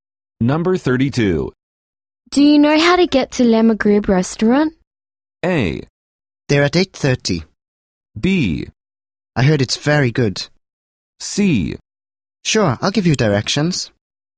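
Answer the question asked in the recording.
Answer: C: Sure, I'll give you directions.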